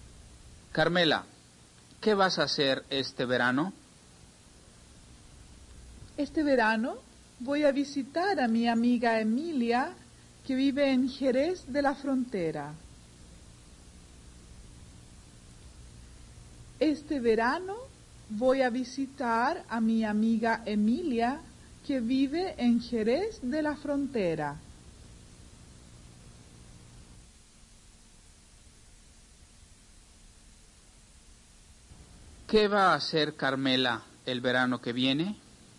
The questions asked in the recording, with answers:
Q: ¿Qué va a hacer Carmela el verano que viene?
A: Carmela va a visitar a su amiga Emilia, que vive en Jerez de la Frontera.